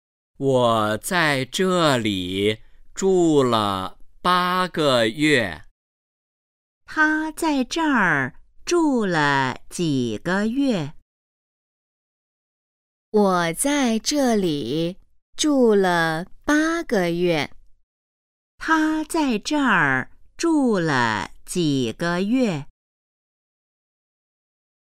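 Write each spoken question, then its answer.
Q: 他在这儿住了几个月?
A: 八个月

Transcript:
我在这里住了八个月。
问:他在这儿住了几个月?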